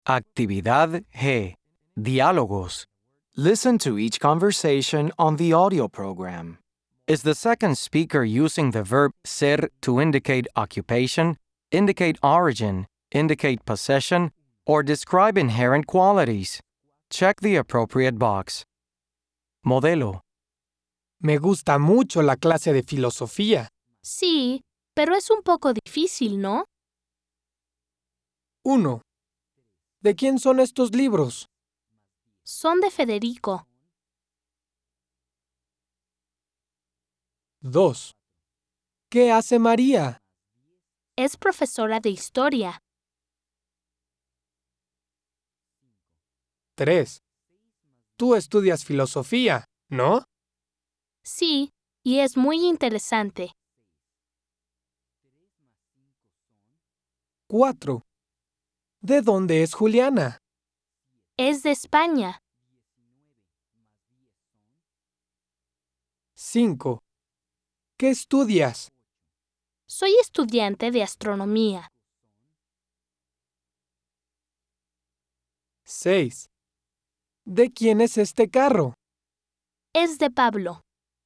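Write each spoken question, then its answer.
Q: Is the second speaker using the verb ser to indicate occupation, indicate origin, indicate possession, or describe inherent qualities?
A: indicate possession

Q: Is the second speaker using the verb ser to indicate occupation, indicate origin, indicate possession, or describe inherent qualities?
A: indicate occupation

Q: Is the second speaker using the verb ser to indicate occupation, indicate origin, indicate possession, or describe inherent qualities?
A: describe inherent qualities

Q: Is the second speaker using the verb ser to indicate occupation, indicate origin, indicate possession, or describe inherent qualities?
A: indicate origin

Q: Is the second speaker using the verb ser to indicate occupation, indicate origin, indicate possession, or describe inherent qualities?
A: indicate occupation

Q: Is the second speaker using the verb ser to indicate occupation, indicate origin, indicate possession, or describe inherent qualities?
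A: indicate possession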